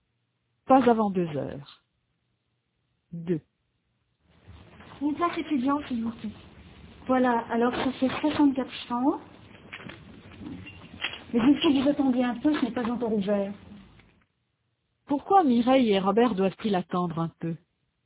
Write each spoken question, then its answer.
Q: Pourquoi Mireille et Robert doivent-ils attendre un peu?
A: Parce que ce n'est pas encore ouvert.